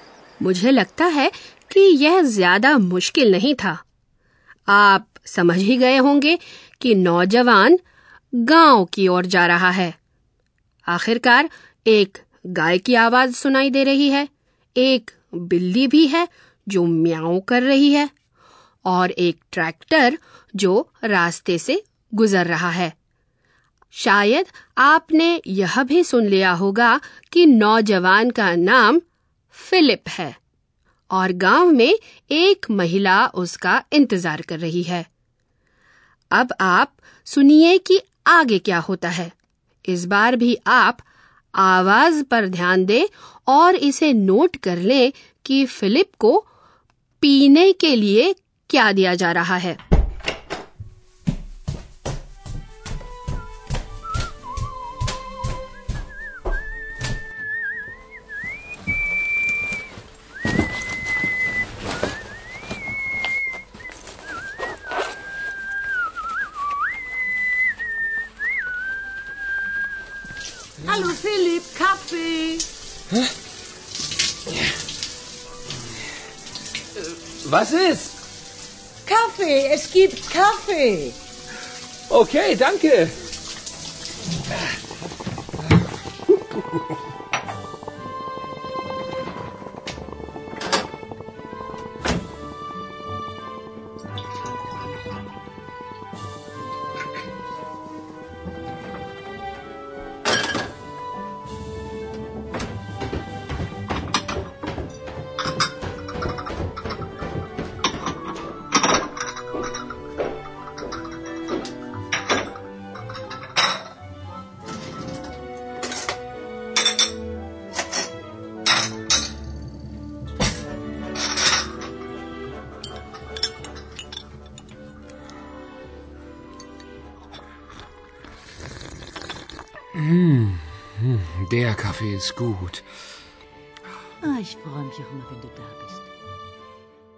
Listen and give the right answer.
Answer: उसके बाद हन वह चाहे जो भी हो कॉफी पेश करती है